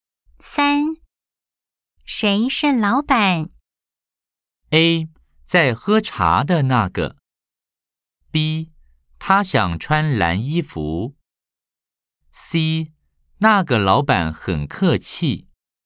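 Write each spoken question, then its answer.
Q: 谁是老板?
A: A: 在喝茶的那个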